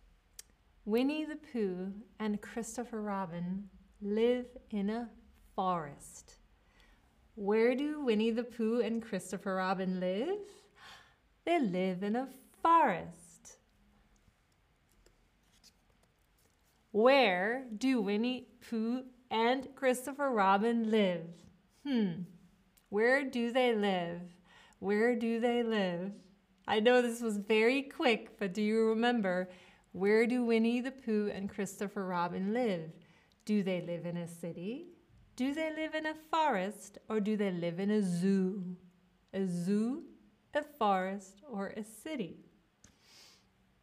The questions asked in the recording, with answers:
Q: Where do Winnie the Pooh and Christopher Robin live?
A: Winnie the Pooh and Christopher Robin live in a forest.